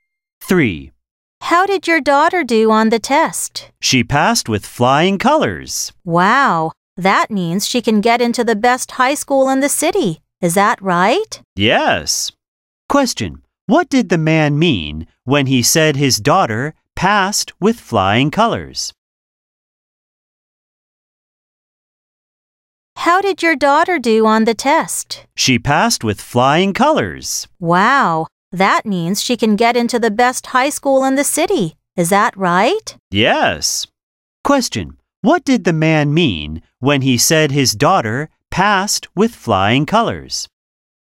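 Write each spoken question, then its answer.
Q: What did the man mean when he said his daughter passed with flying colors?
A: She did very well on the test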